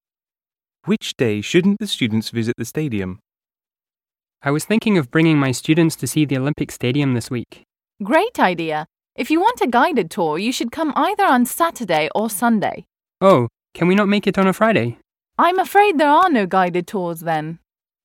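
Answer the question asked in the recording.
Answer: Friday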